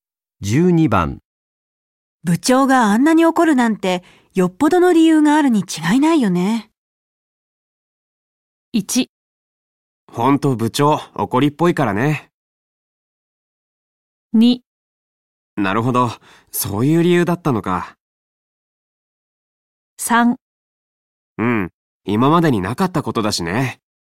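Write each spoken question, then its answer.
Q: 部長があんなに怒るなんてよっぽどの理由があるに違いないよね。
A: 3: うん今までになかったことだしね。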